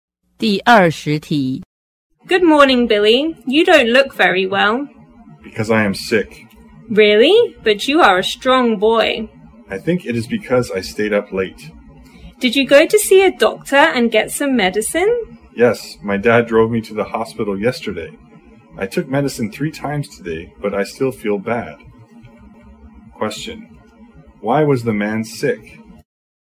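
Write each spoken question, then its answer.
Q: why was the man sick?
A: He stayed up late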